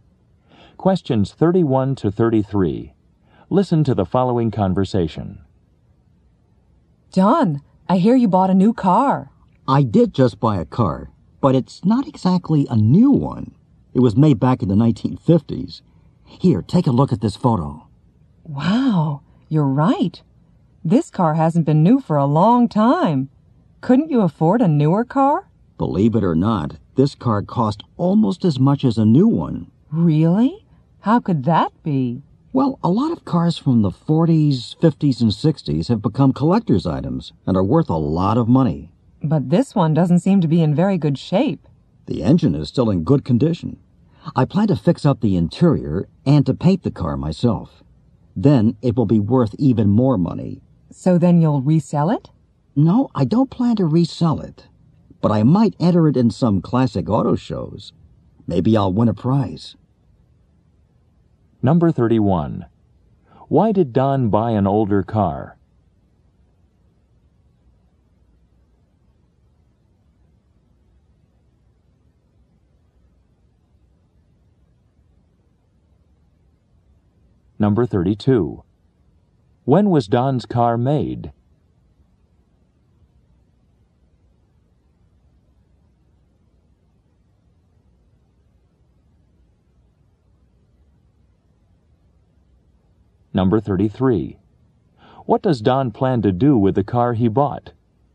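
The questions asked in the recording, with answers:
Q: When was Don's car made?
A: In the 1950s

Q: What does Don plan to do with the car he bought?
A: Fix it up and enter it in classic auto shows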